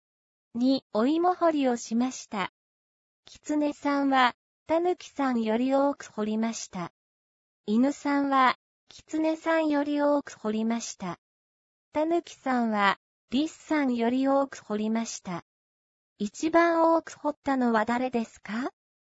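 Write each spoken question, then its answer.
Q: 一番多く掘ったのは誰ですか?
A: 犬さん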